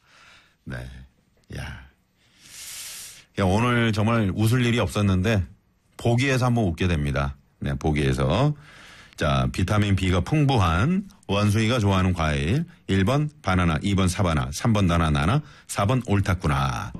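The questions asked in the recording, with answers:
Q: 비타민 B가 풍부한 원숭이가 좋아하는 과일.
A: 1번: 바나나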